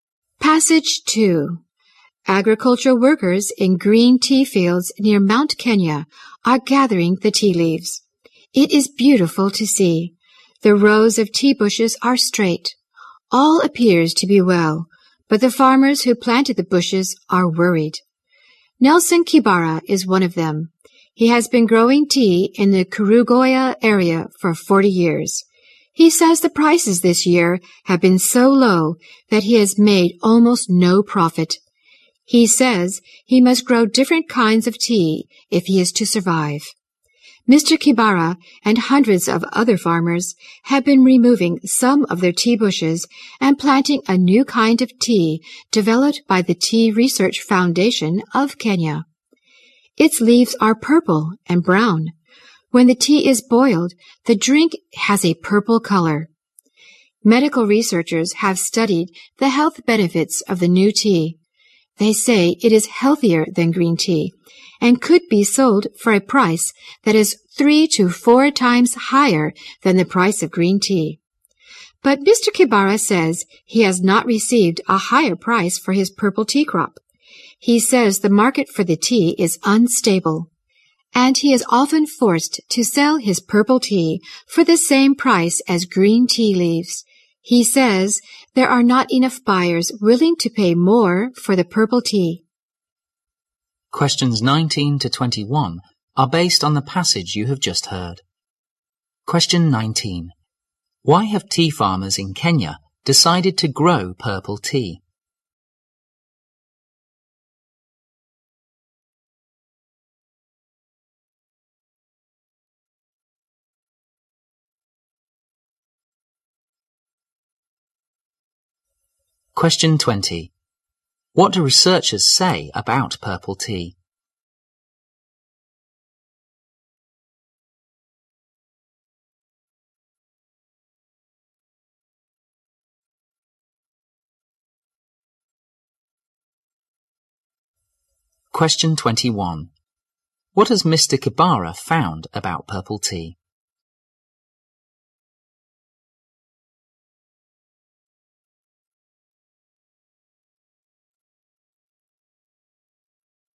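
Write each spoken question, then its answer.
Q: Why have tea farmers in Kenya decided to grow purple tea?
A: Green tea prices were too low to make a profit

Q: What do researchers say about purple tea?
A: It is healthier than green tea and could sell for 3 to 4 times the price

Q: What has Mr. Kibara found about purple tea?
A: Its market is unstable; he often sells it at green tea prices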